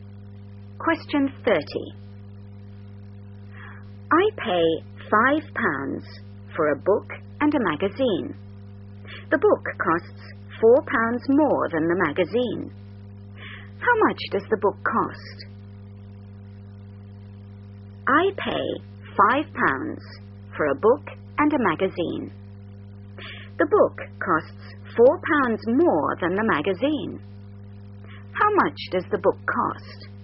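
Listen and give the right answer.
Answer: £4.50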